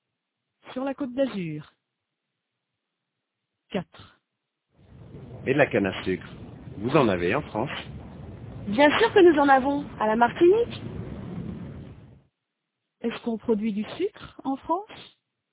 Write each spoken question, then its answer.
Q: Est-ce qu'on produit du sucre en France?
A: Oui, à la Martinique.